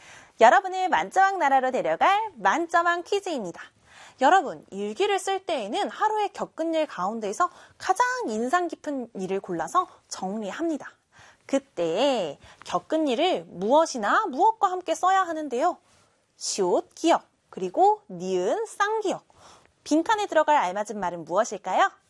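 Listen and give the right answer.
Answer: 생각, 느낌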